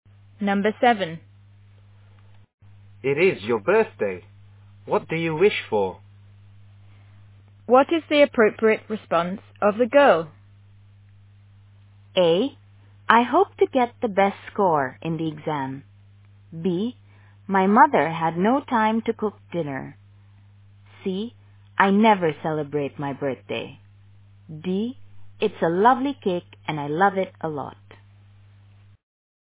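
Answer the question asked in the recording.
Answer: A: I hope to get the best score in the exam.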